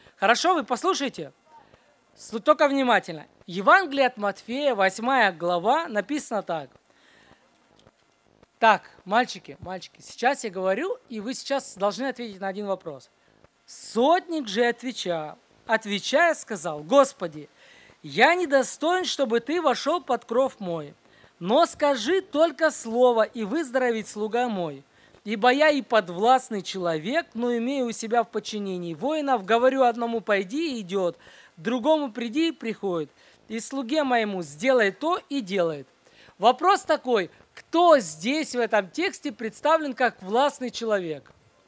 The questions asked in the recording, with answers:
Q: Вопрос такой: кто здесь в этом тексте представлен как властный человек?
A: Сотник.